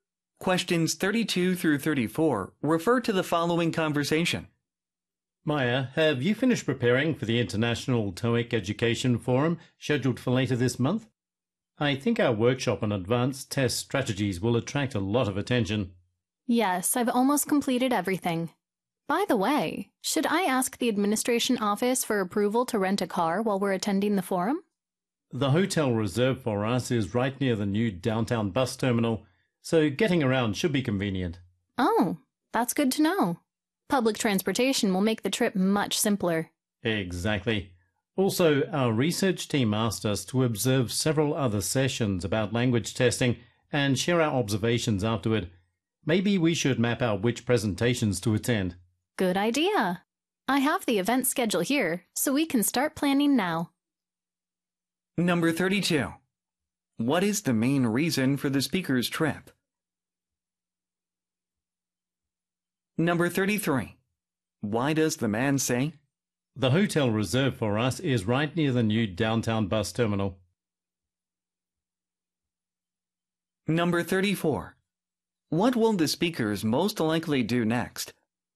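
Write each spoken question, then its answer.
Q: What is the main reason for the speaker's trip?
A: To attend the International TOEIC Education Forum and give a workshop

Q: What will the speakers most likely do next?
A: Plan which presentations to attend using the event schedule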